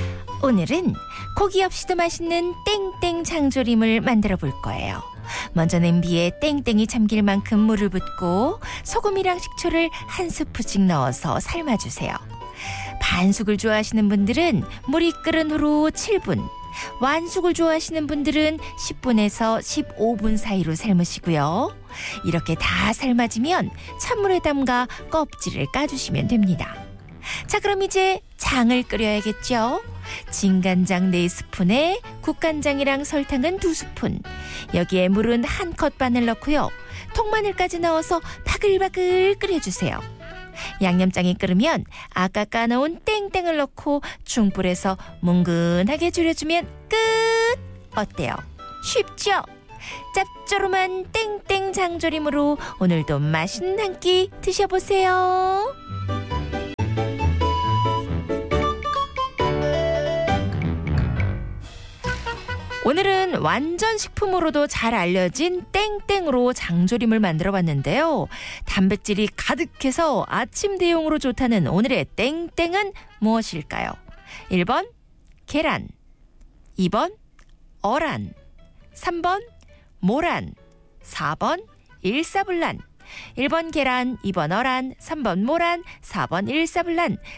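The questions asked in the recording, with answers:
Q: 단백질이 가득해서 아침 대용으로 좋다는 오늘의 땡땡은 무엇일까요?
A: 1: 계란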